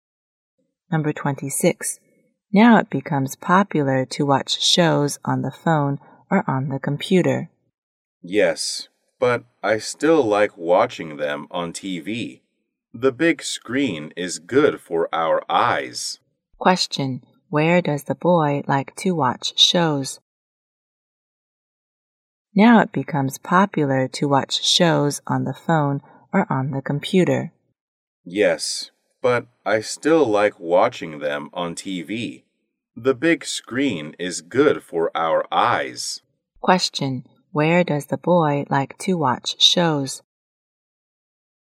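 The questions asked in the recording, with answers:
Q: Where does the boy like to watch shows?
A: On TV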